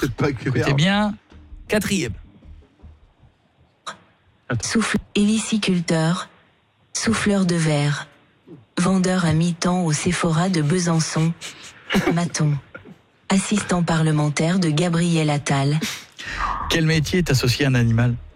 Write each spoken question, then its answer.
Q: Quel métier est associé à un animal?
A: Héliciculteur.